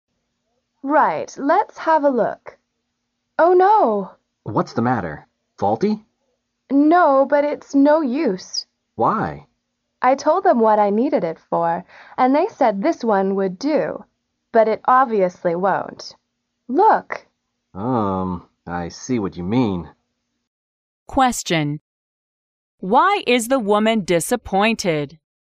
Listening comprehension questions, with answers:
Why is the woman disappointed?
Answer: The item obviously doesn't serve her purpose.